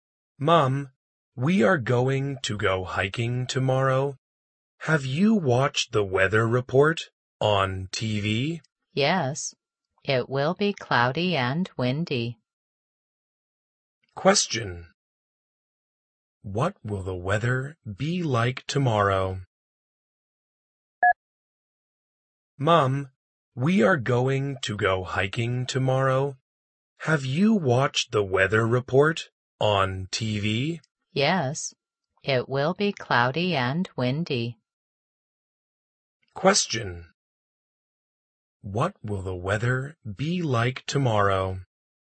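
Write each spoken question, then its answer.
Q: What will the weather be like tomorrow?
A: Cloudy and windy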